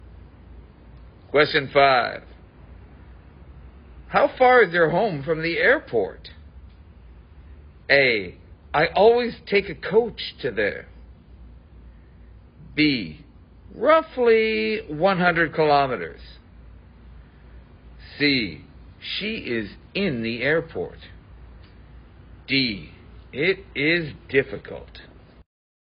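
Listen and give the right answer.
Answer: B: Roughly 100 kilometers.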